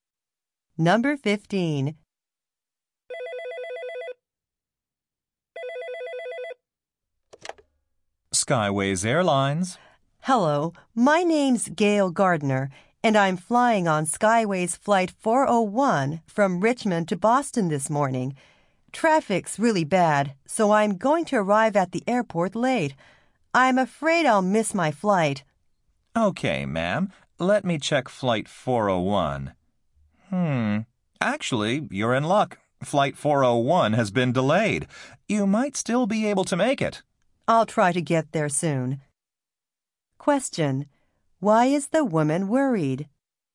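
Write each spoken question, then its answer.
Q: Why is the woman worried?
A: Traffic is bad and she may miss her flight.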